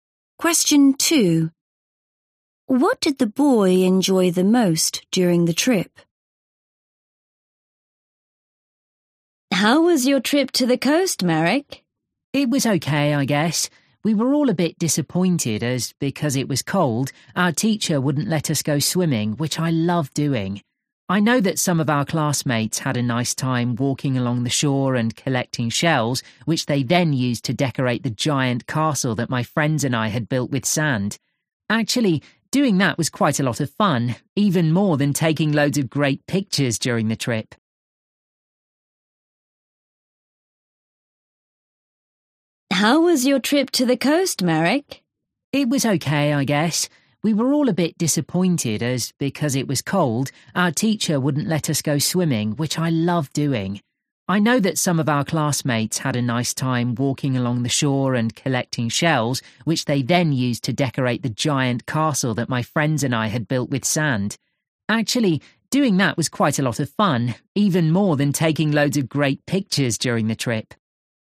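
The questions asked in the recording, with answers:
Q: What did the boy enjoy the most during the trip?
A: Building a sand castle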